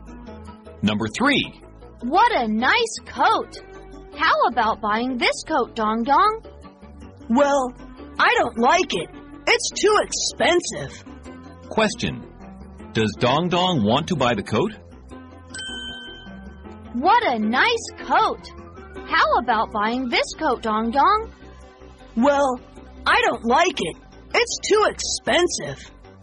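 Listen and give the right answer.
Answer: No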